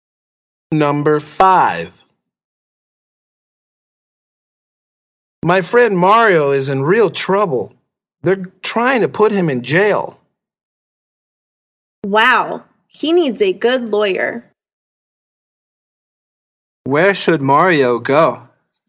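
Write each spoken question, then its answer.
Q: Where should Mario go?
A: a lawyer's office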